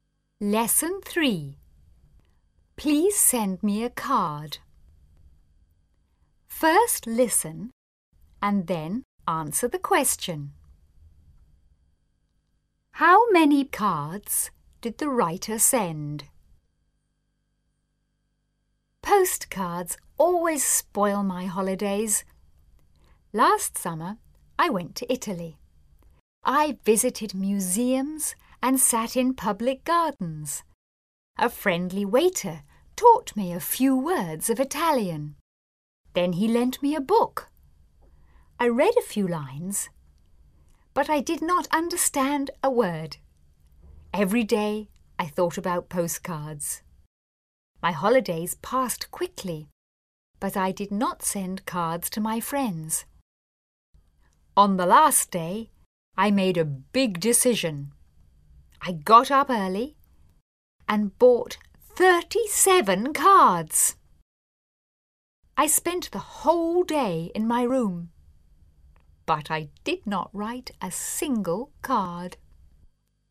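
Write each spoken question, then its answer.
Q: How many cards did the writer send?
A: None; the writer did not send any cards.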